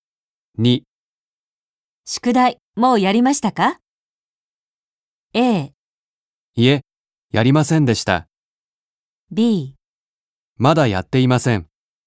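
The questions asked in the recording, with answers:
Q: 宿題もうやりましたか?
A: B: まだやっていません。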